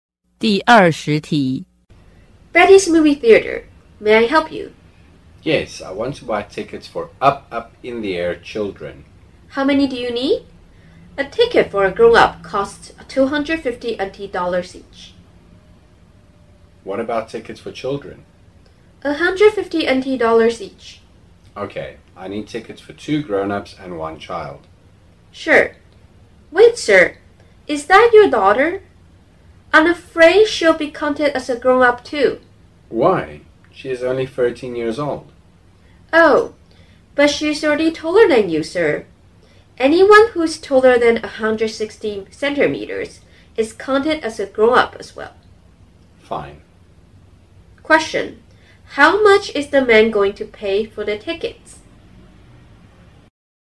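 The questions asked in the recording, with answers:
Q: How much is the man going to pay for the tickets?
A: $750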